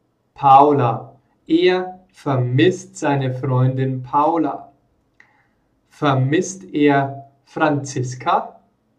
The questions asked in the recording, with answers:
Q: Vermisst er Franziska?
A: Nein, er vermisst nicht Franziska, sondern er vermisst seine Freundin Paula.